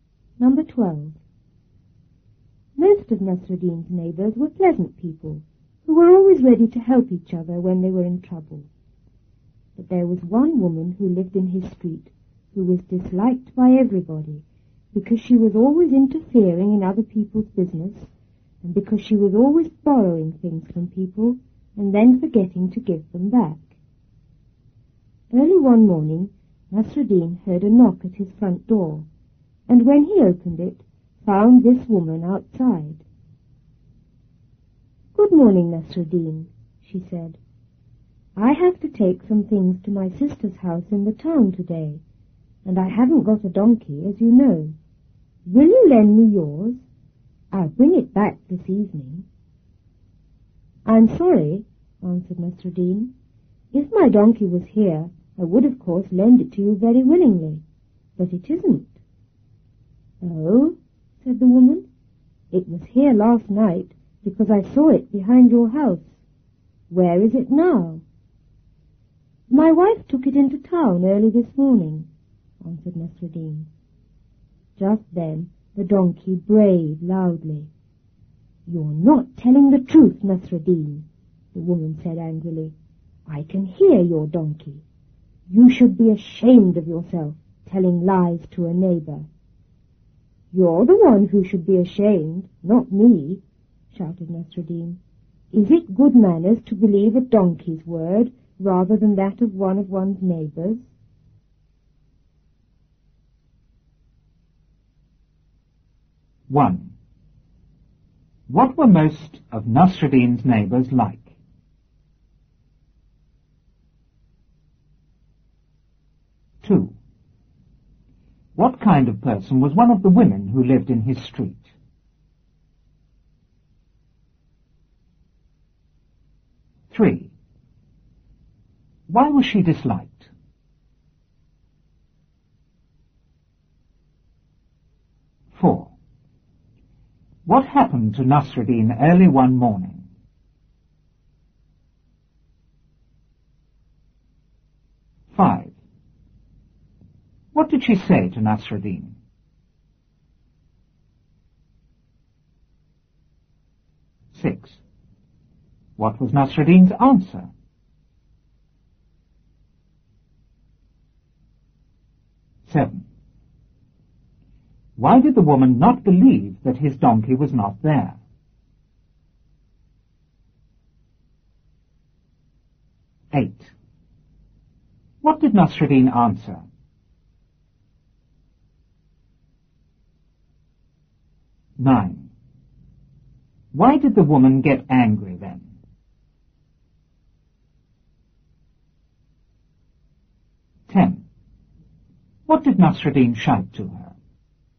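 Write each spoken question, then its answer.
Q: What were most of Nasruddin's neighbors like?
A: Pleasant people, always ready to help each other in trouble

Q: What kind of person was one of the women who lived in his street?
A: Disliked by everybody; interfering and always borrowing things

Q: Why was she disliked?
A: She interfered in other people's business and borrowed things without giving them back

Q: What happened to Nasruddin early one morning?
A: He heard a knock at his door and found the woman outside

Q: What did she say to Nasruddin?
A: She asked to borrow his donkey to take things to her sister's house in town

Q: What was Nasruddin's answer?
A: He was sorry, but his donkey wasn't there

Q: Why did the woman not believe that his donkey was not there?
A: She had seen it behind his house the night before

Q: What did Nasruddin answer?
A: His wife had taken it into town early that morning

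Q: Why did the woman get angry then?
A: The donkey brayed loudly, so she knew he was lying

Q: What did Nasruddin shout to her?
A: She should be ashamed for believing a donkey's word rather than a neighbor's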